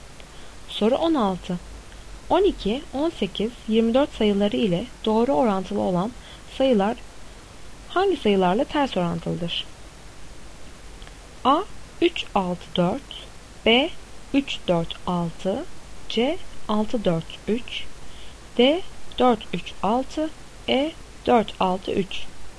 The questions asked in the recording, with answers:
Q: 12, 18, 24 sayıları ile doğru orantılı olan sayılar hangi sayılarla ters orantılıdır?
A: Doğru cevap C, 6, 4, 3.